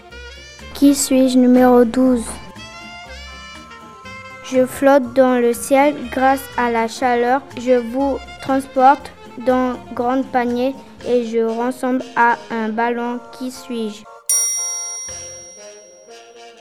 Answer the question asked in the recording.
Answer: une montgolfière.